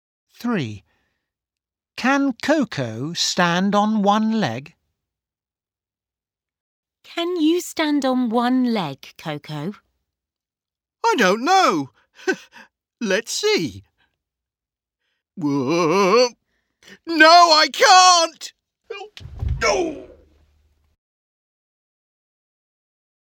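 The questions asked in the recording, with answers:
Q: Can Coco stand on one leg?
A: No, she can't.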